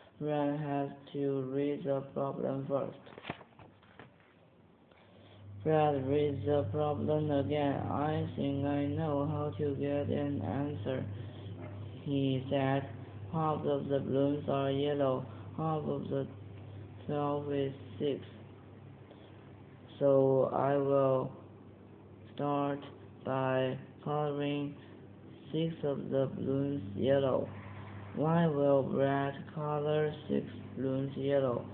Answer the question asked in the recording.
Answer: Brad will color 6 balloons yellow because 6 is half of 12.